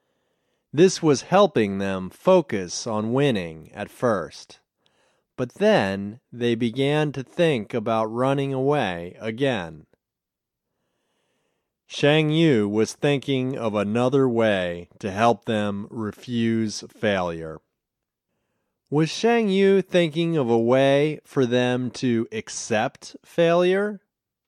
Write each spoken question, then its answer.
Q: Was Shang Yu thinking of a way for them to accept failure?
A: No, he wasn't thinking of a way for them to accept failure.